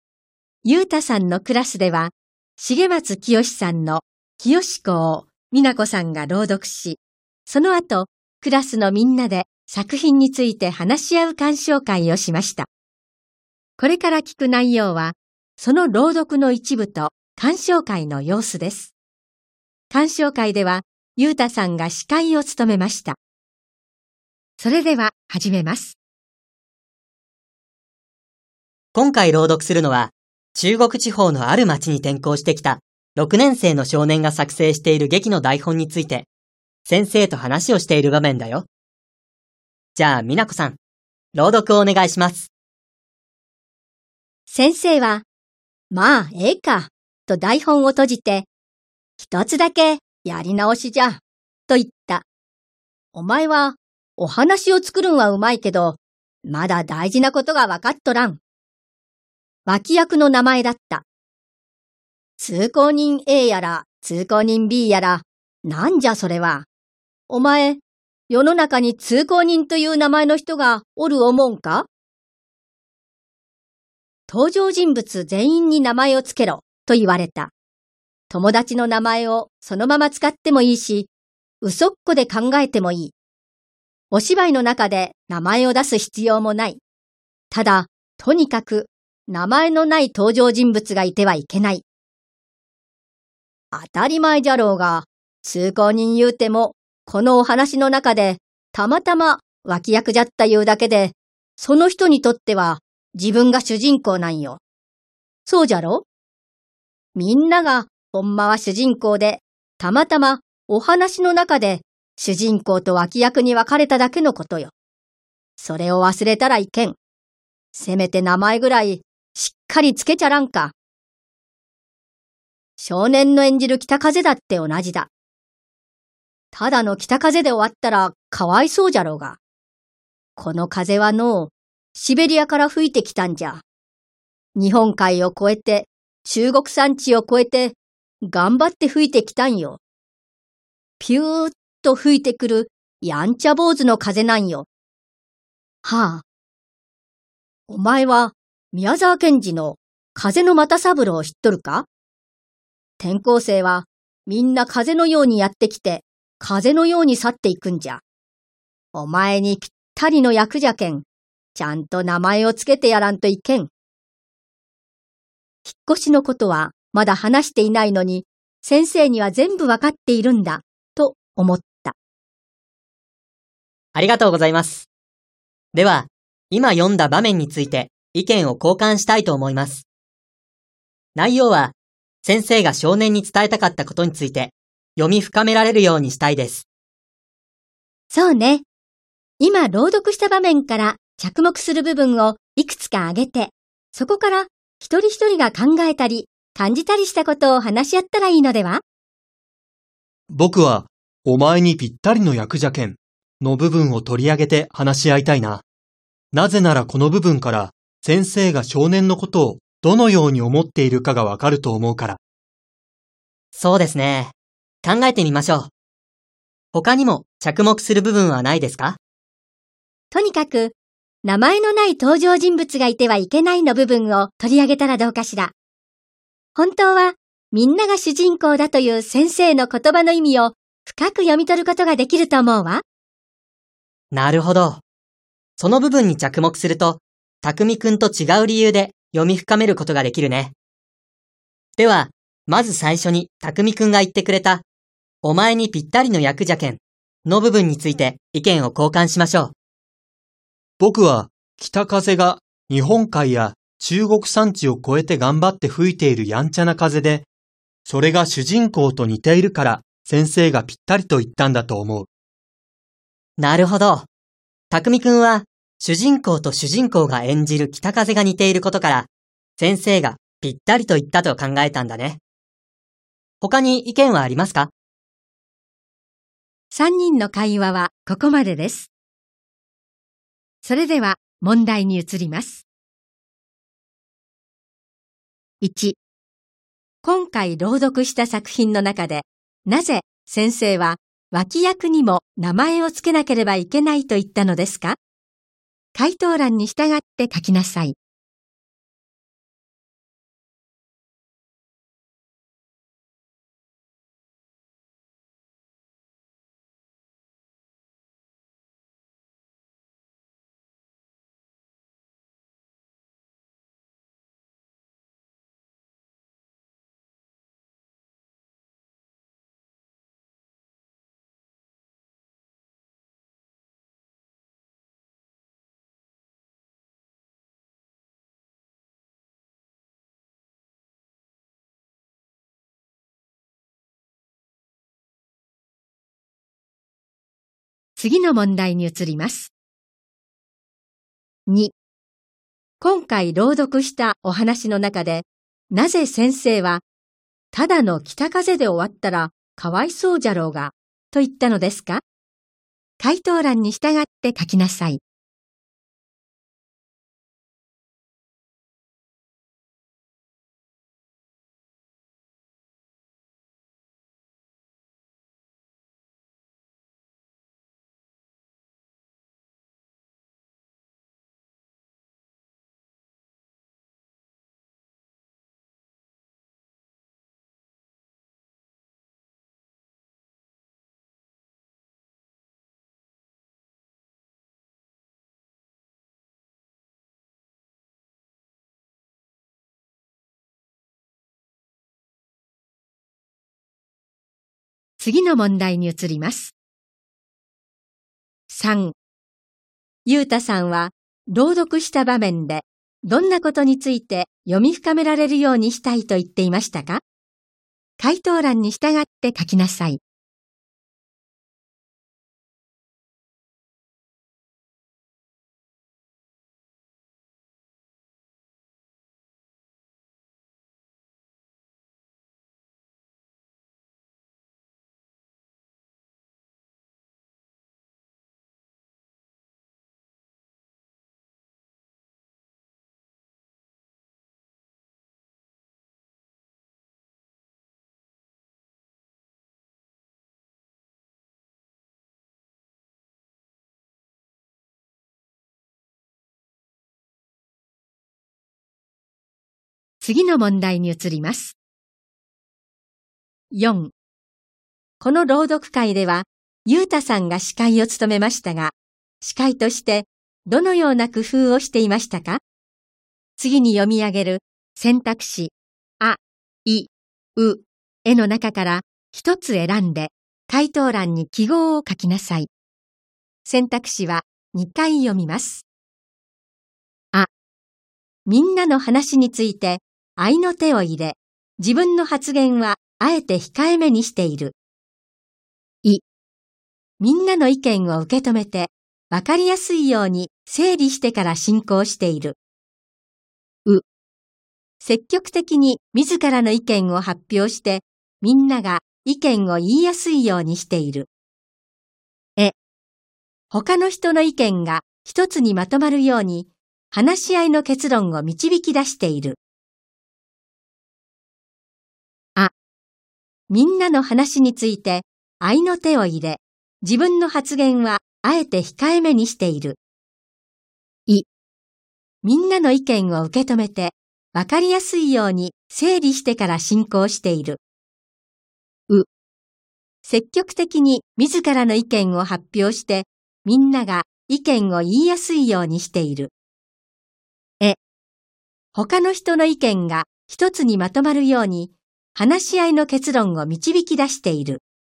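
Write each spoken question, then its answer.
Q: 今回朗読した作品の中で、 なぜ先生は脇役にも名前をつけなければいけないと言ったのですか?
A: 脇役もその人にとっては自分が主人公だから

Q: 今回朗読したお話の中で、なぜ先生は、ただの北風で終わったらかわいそうじゃろうが、と言ったのですか?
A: 北風もシベリアから日本海や中国山地を越えて頑張って吹いてきたやんちゃ坊主の風で、名前のない登場人物がいてはいけないから

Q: ゆうたさんは朗読した場面でどんなことについて読み深められるようにしたいと言っていましたか?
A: 先生が少年に伝えたかったこと

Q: この朗読会では、ゆうたさんが司会を務めましたが、司会としてどのような工夫をしていましたか?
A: い: みんなの意見を受け止めて、わかりやすいように整理してから進行している。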